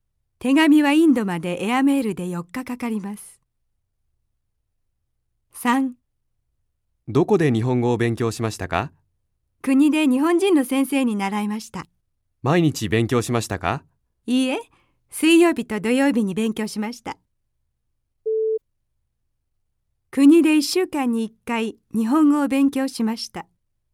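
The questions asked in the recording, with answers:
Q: 国で1週間に1回日本語を勉強しました。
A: いいえ(水曜日と土曜日、1週間に2回)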